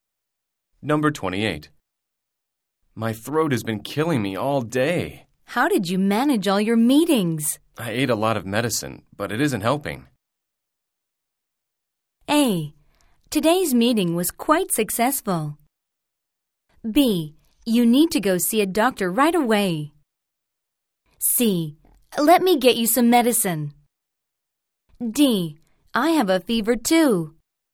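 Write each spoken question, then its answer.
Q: My throat has been killing me all day. How did you manage all your meetings? I ate a lot of medicine, but it isn't helping.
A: B: You need to go see a doctor right away.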